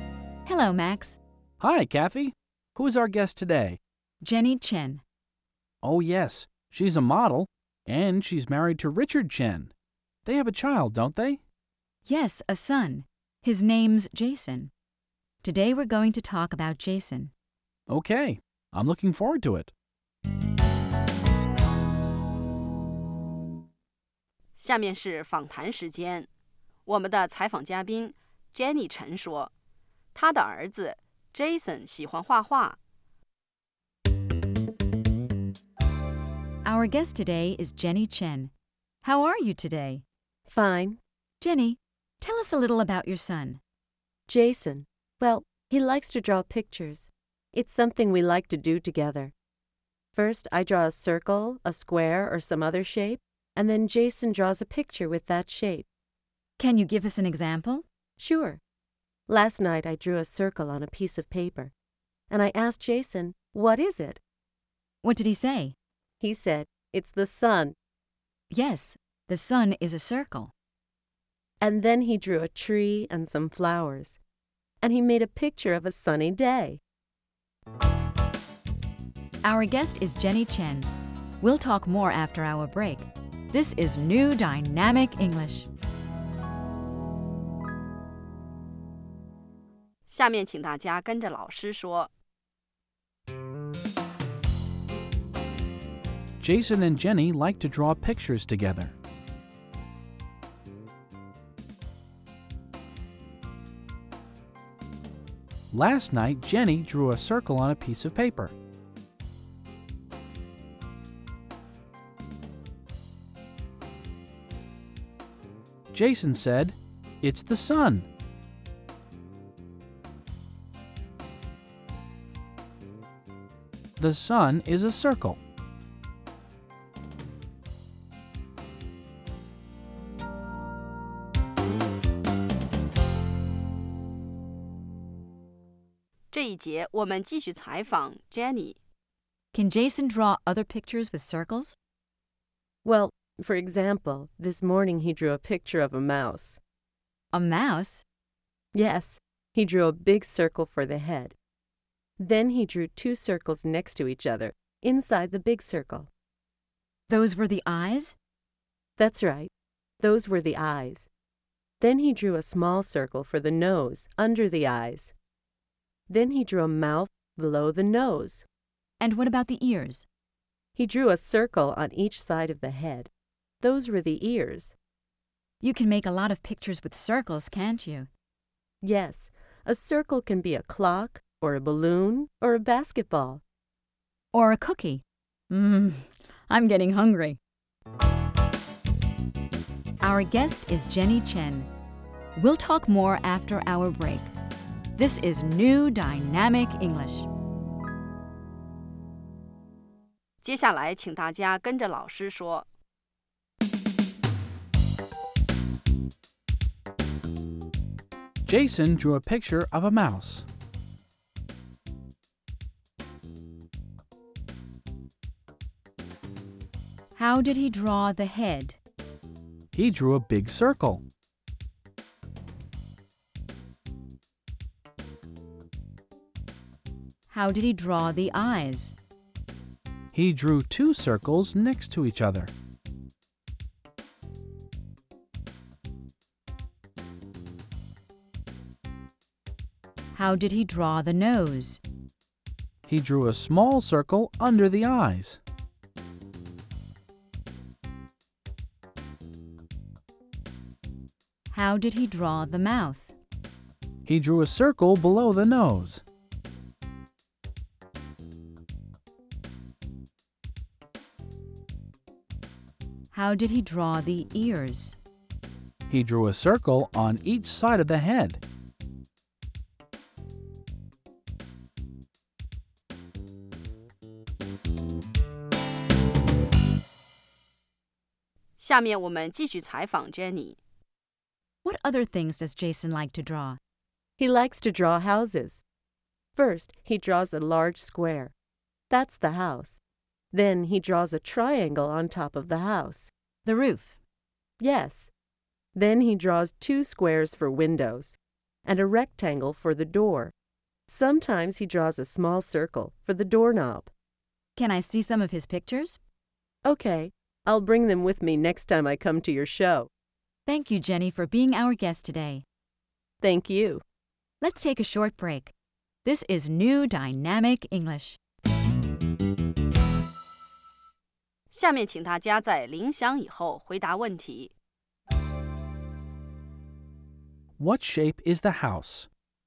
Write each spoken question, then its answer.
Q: What shape is the house?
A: It's a square.